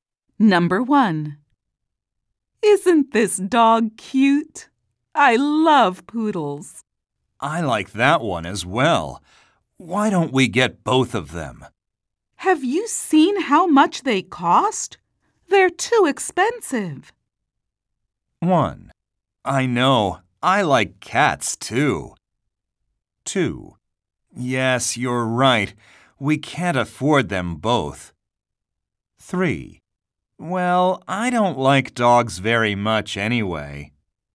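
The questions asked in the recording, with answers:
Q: They're too expensive.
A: 2: Yes, you're right. We can't afford them both.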